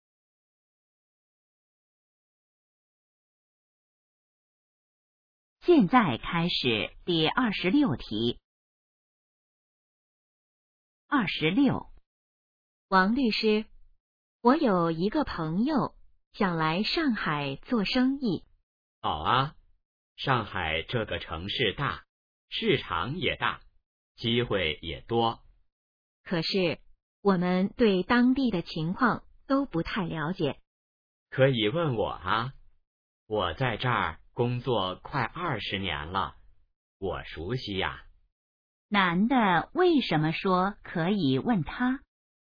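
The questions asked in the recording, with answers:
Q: 男的为什么说可以问他?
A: 他熟悉当地情况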